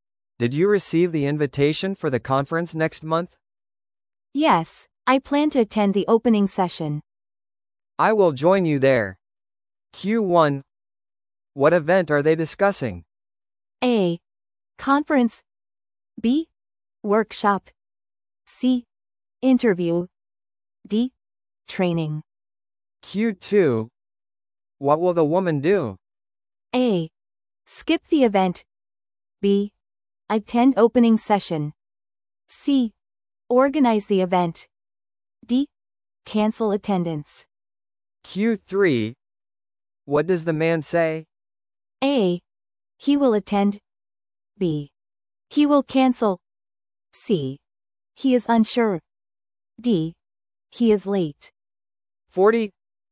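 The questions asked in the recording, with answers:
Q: What event are they discussing?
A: A: Conference.

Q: What will the woman do?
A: B: Attend opening session.

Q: What does the man say?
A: A: He will attend.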